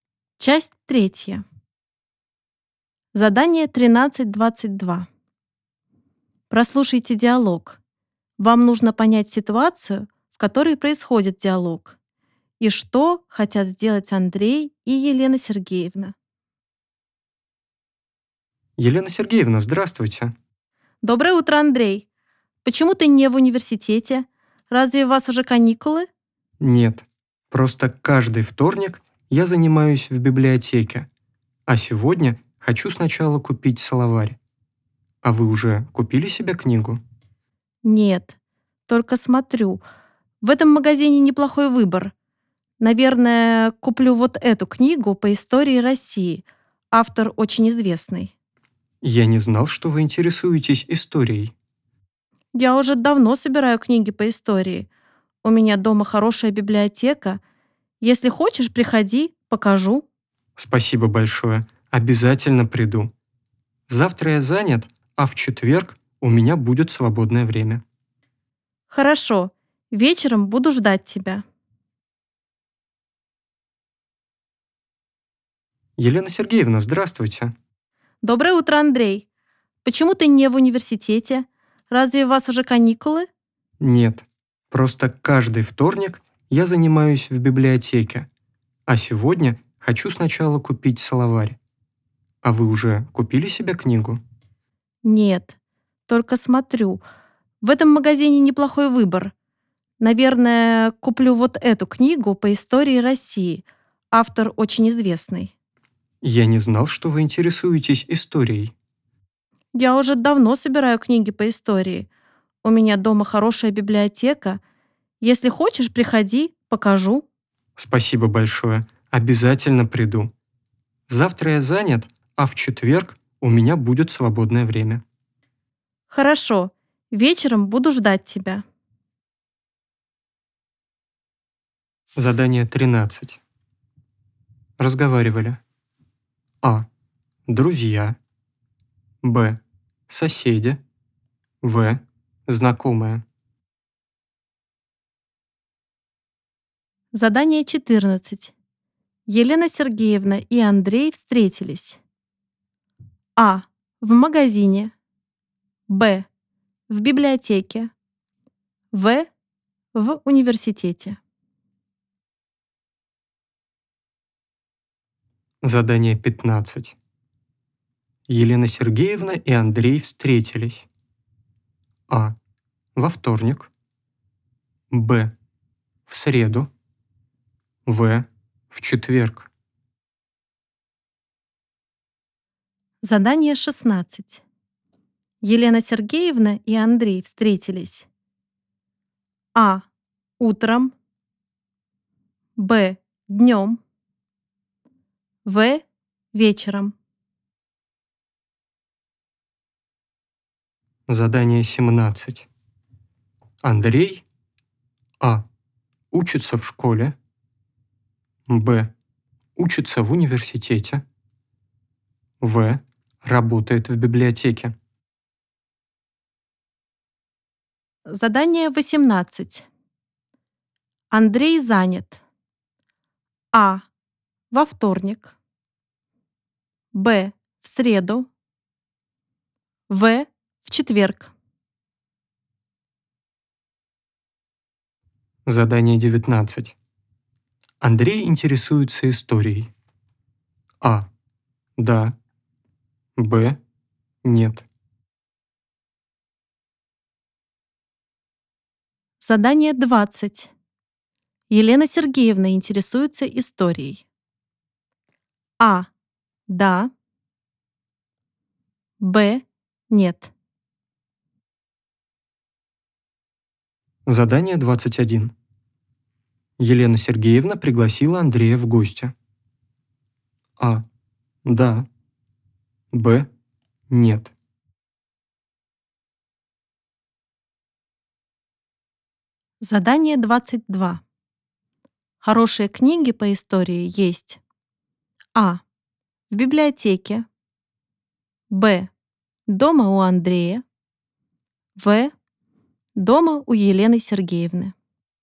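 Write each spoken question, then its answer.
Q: Разговаривали.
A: В: Знакомые.

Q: Елена Сергеевна и Андрей встретились.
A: А: В магазине.

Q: Елена Сергеевна и Андрей встретились.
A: А: Во вторник.

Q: Елена Сергеевна и Андрей встретились.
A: А: Утром.

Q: Андрей.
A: Б: Учится в университете.

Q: Андрей занят.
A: Б: В среду.

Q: Елена Сергеевна интересуется историей.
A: А: Да.

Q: Елена Сергеевна пригласила Андрея в гости.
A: А: Да.

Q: Хорошие книги по истории есть.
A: В: Дома у Елены Сергеевны.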